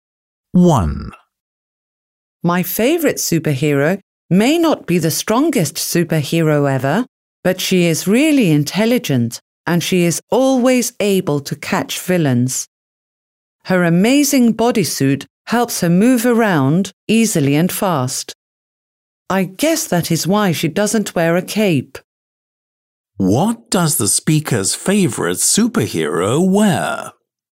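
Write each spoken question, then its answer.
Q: What does the speaker's favorite superhero wear?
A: A bodysuit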